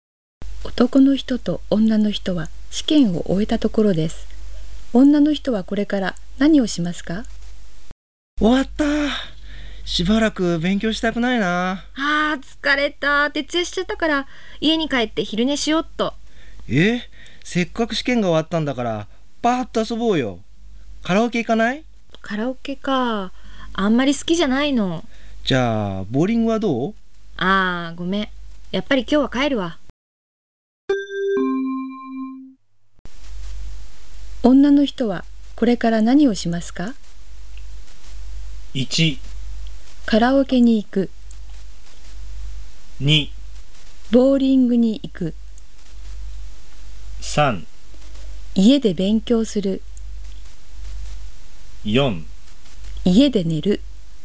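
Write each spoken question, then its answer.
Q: 女の人はこれから何をしますか?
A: 4: 家で寝る。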